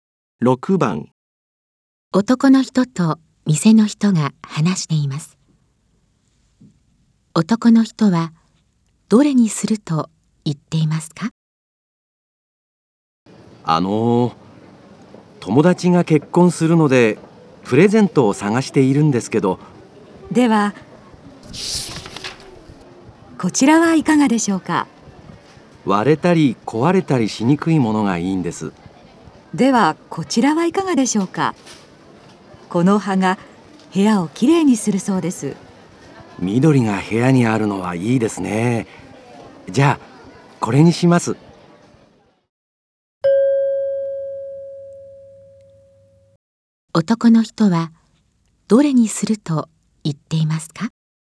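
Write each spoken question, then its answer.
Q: 男の人はどれにすると言っていますか?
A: 部屋をきれいにする葉の植物(緑)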